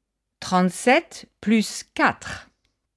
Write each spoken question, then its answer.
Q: 37 plus 4.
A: Ça fait 41.